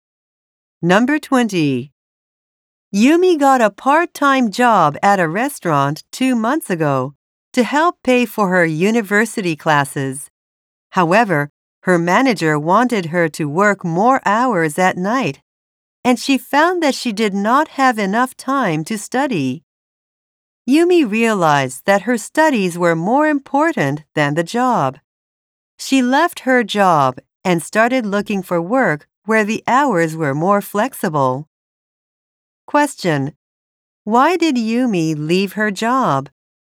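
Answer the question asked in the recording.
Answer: She did not have enough time to study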